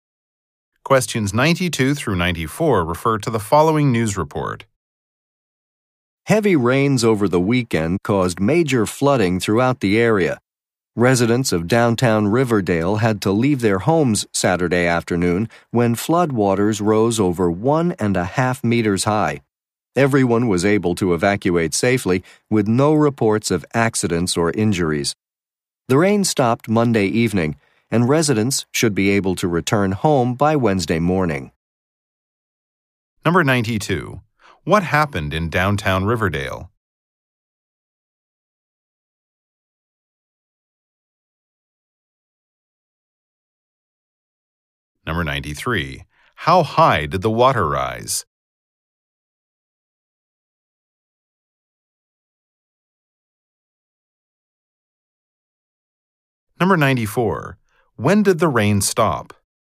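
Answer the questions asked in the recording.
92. Flooding forced residents to leave their homes
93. Over 1.5 meters
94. Monday evening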